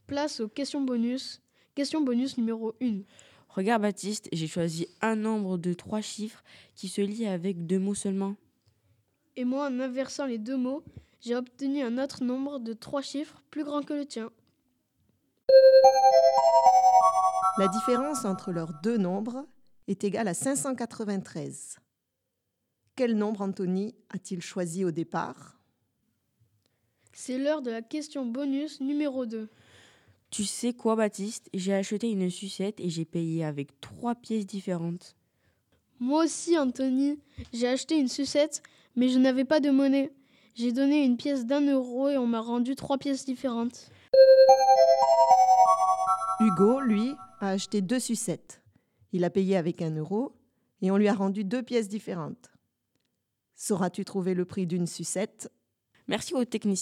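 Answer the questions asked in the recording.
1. 107 (cent sept)
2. 35 centimes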